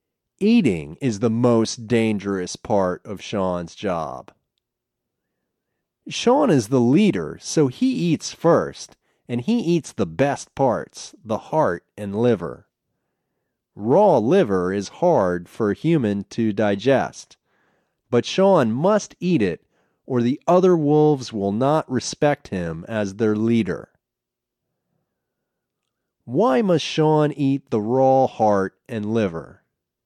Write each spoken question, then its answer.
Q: Why must Sean eat the raw heart and liver?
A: He must eat it or the other wolves will not respect him as their leader.